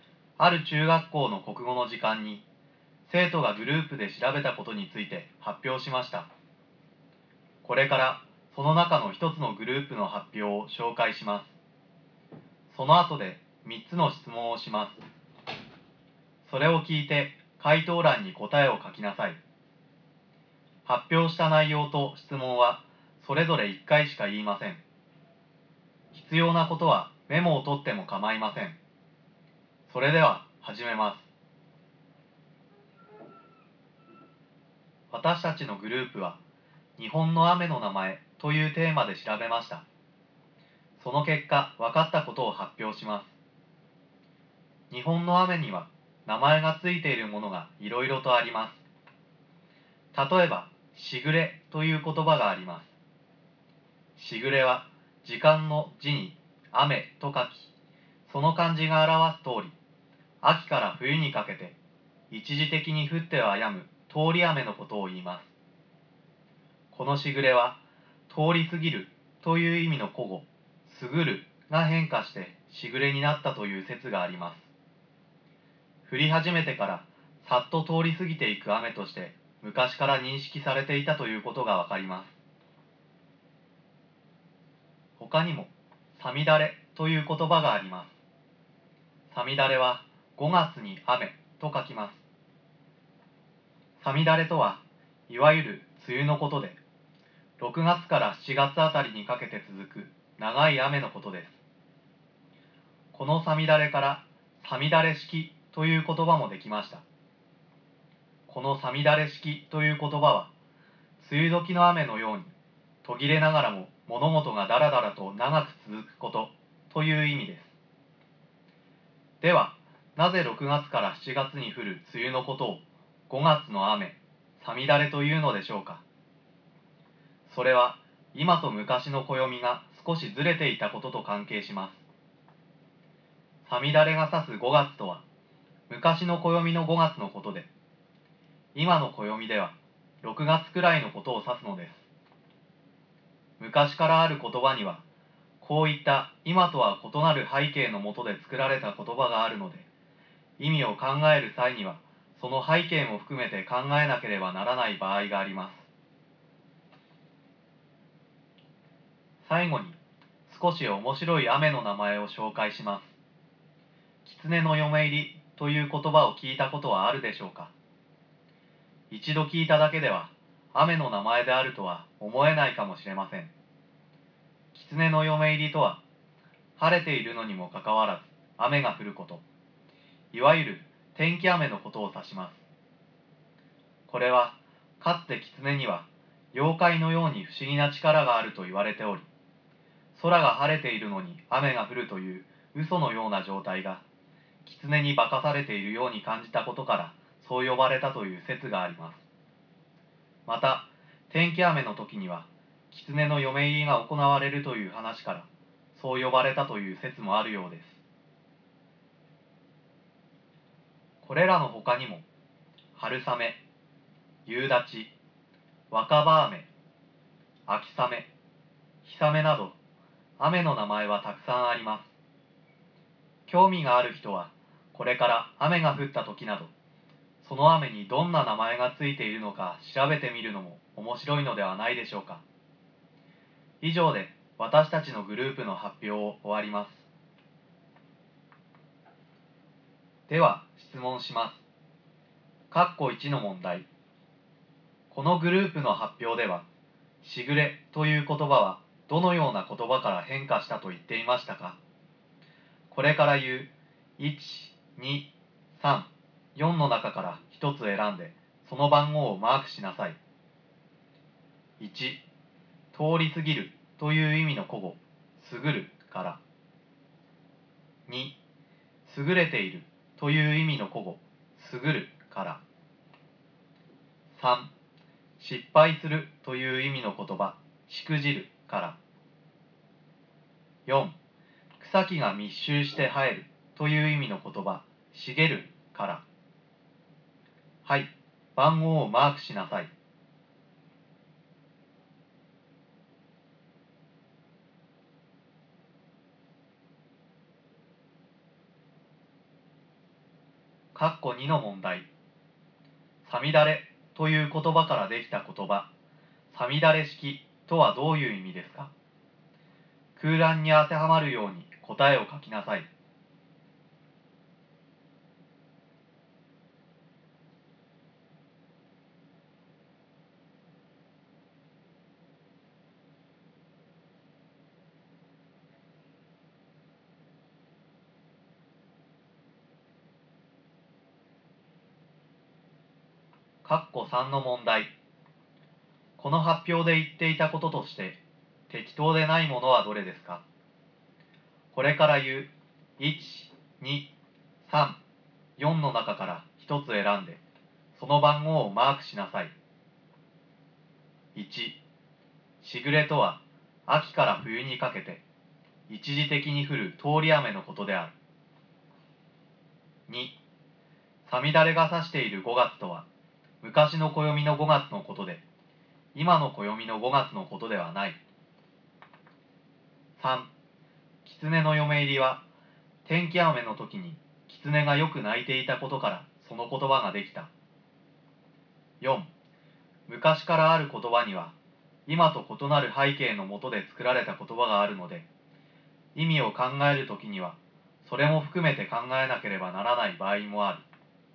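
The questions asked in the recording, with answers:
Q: このグループの発表ではしぐれという言葉はどのような言葉から変化したと言っていましたか。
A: 1: 通り過ぎるという意味の古語すぐるから

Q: さみだれという言葉からできた言葉、さみだれ式とはどういう意味ですか?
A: 梅雨時の雨のように途切れながらも物事がだらだらと長く続くこと

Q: この発表で言っていたこととして、適当でないものはどれですか?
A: 3: 狐の嫁入りは、天気雨の時に狐がよく鳴いていたことからその言葉ができた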